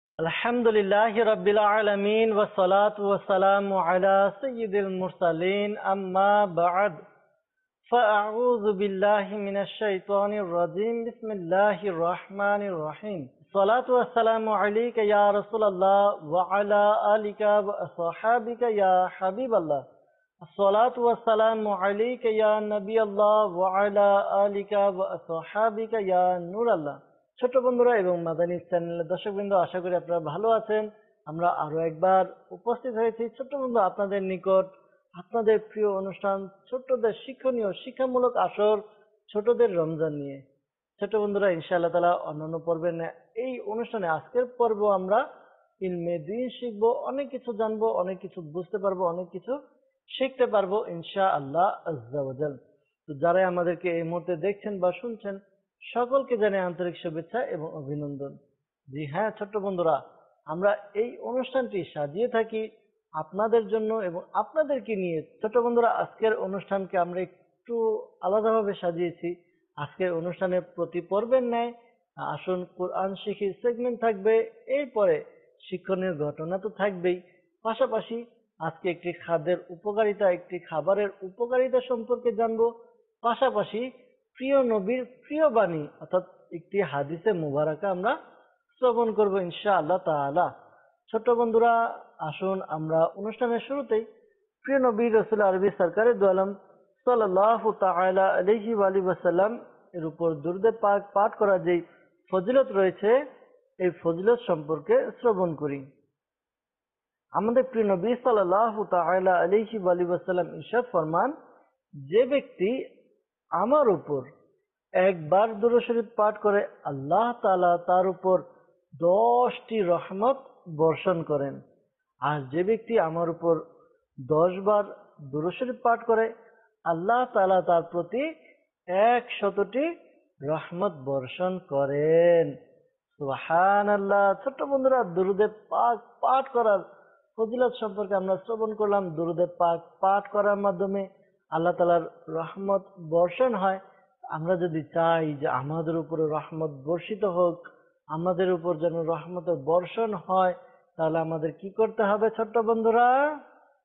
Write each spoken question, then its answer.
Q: আমরা যদি চাই যে আমাদের উপরে রহমত বর্ষিত হোক, আমাদের উপর যেন রহমতের বর্ষণ হয়, তাহলে আমাদের কি করতে হবে ছোট্ট বন্ধুরা?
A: জি হ্যাঁ ছোট্ট বন্ধুরা, আমাদেরকে দুরুদে পাক পাঠ করতে হবে।